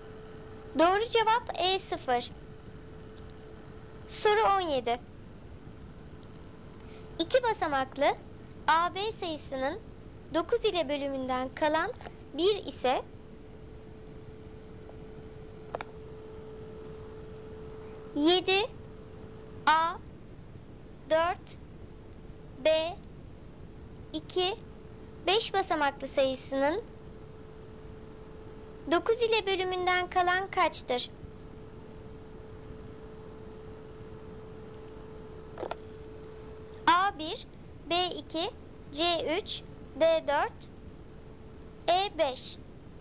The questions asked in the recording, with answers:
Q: yedi A dört B iki beş basamaklı sayısının 9 ile bölümünden kalan kaçtır?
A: Doğru cevap E5.